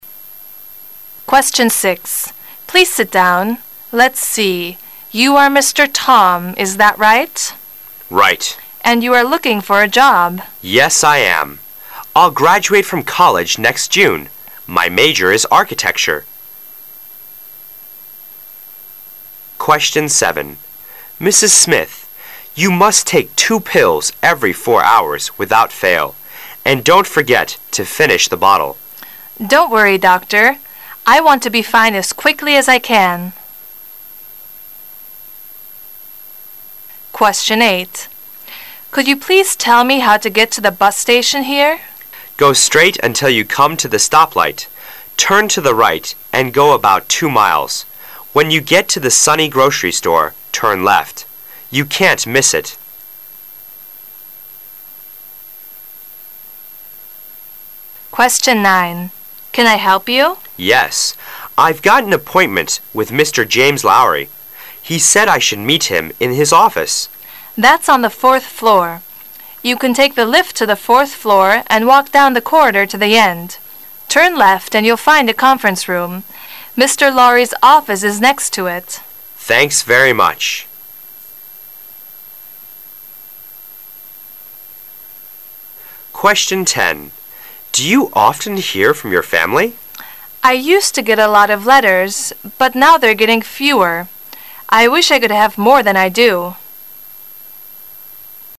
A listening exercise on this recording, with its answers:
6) What probably is the relationship between the two speakers?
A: Interviewer and interviewee.

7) What will the woman probably do?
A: Take the doctor's advice.

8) What is the woman trying to do?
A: Get directions to the bus station.

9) What does the man want to know?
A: The way to Mr. Laury's office.

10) What do we learn from the woman's words?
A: She hasn't so many letters as before.